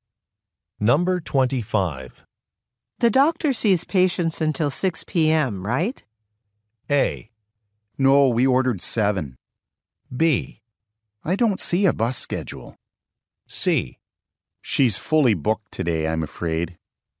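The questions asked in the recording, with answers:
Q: The doctor sees patients until 6 p.m., right?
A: C: She's fully booked today, I'm afraid.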